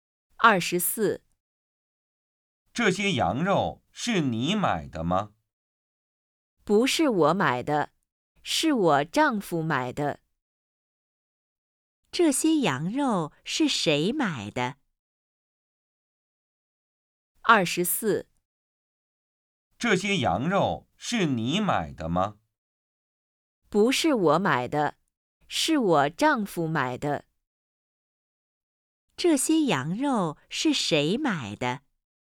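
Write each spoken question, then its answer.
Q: 这些羊肉是谁买的?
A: 她丈夫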